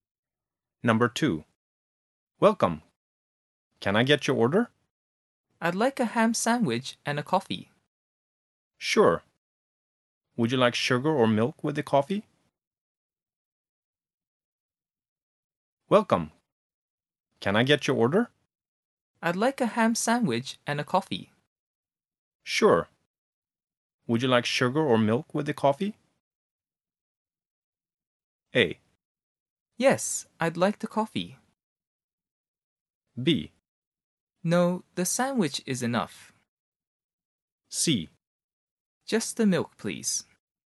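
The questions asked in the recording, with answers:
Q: Sure. Would you like sugar or milk with the coffee?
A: C: Just the milk, please.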